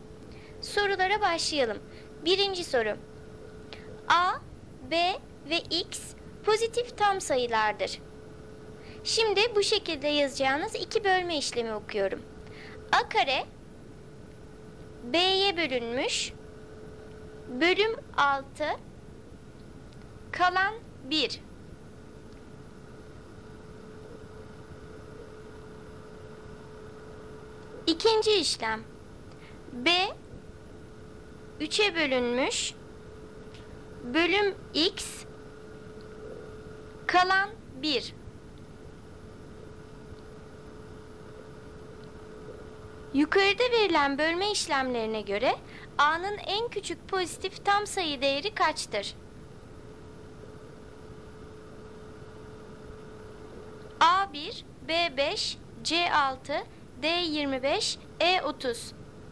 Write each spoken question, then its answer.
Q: Yukarıda verilen bölme işlemlerine göre A'nın en küçük pozitif tam sayı değeri kaçtır?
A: Doğru cevap B 5.